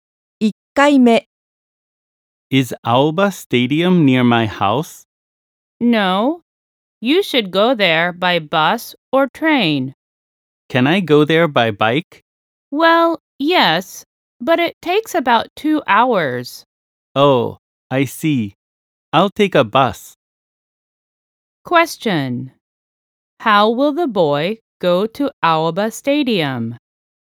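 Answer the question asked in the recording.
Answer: By bus.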